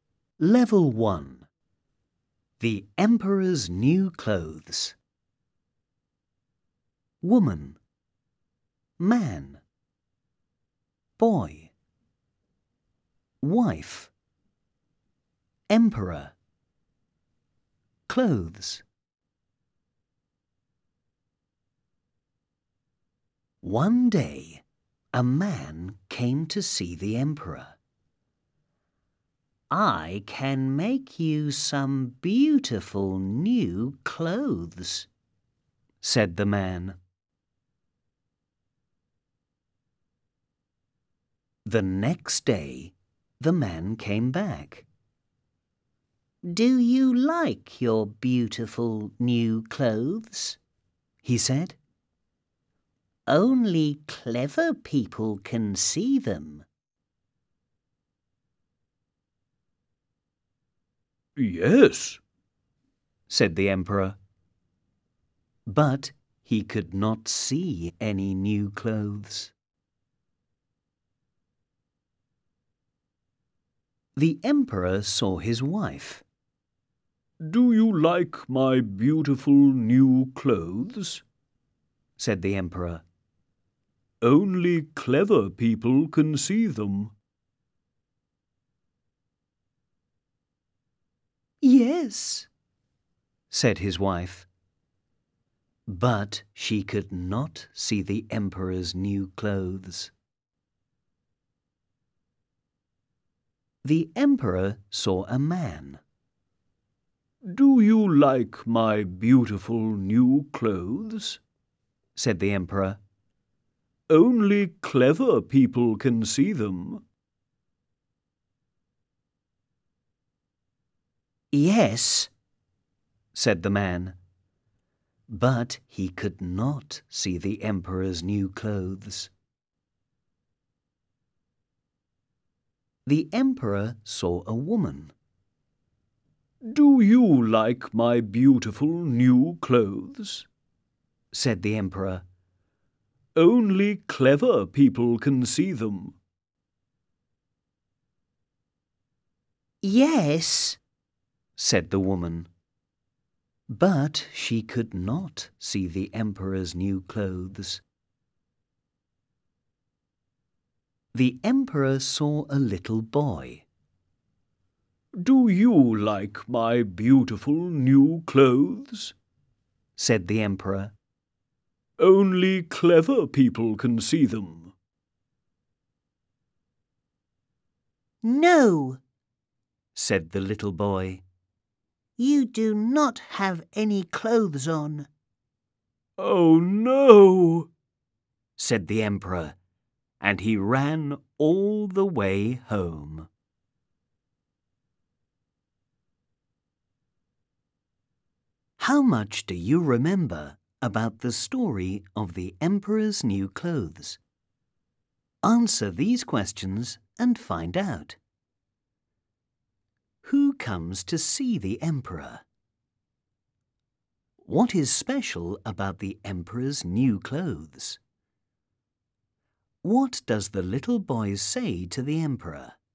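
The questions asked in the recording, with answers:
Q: Who comes to see the emperor?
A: A man

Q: What is special about the emperor's new clothes?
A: Only clever people can see them

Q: What does the little boy say to the emperor?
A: You do not have any clothes on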